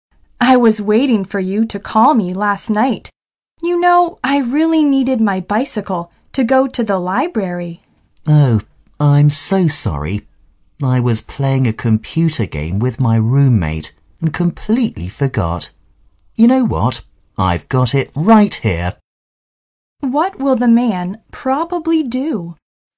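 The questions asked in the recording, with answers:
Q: What will the man probably do?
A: Give the woman back her bicycle right away.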